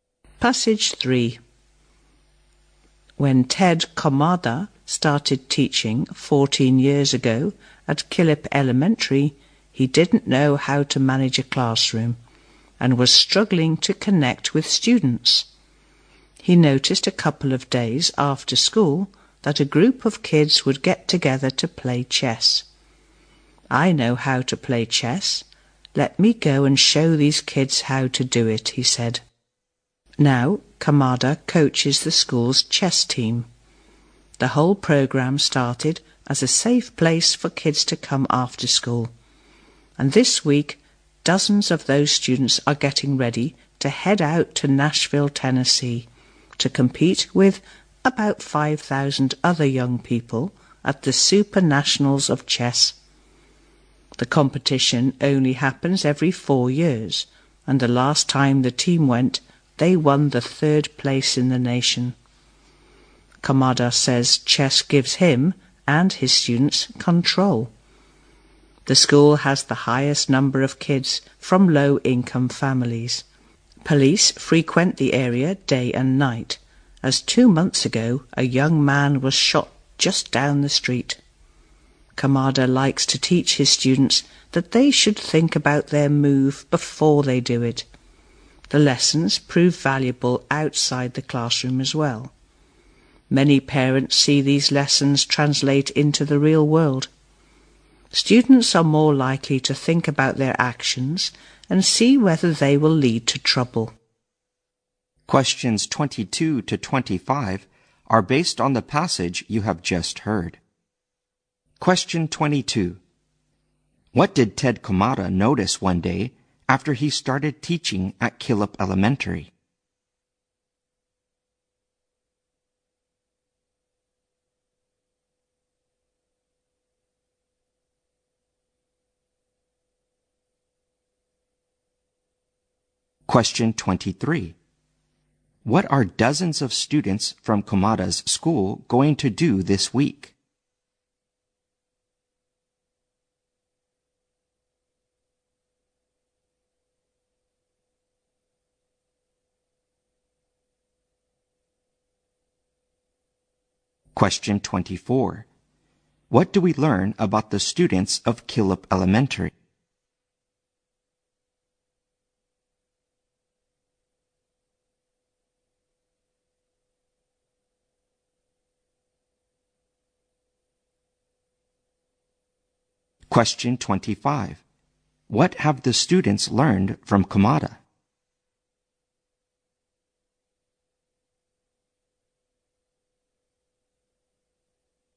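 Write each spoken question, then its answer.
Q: What did Ted Komada notice one day after he started teaching at Killip Elementary?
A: A group of kids got together after school to play chess.

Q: What are dozens of students from Komada's school going to do this week?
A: Compete in the Super Nationals of Chess in Nashville.

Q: What do we learn about the students of Killip Elementary?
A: Many of them come from low-income families.

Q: What have the students learned from Komada?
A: To think about their moves and actions before making them.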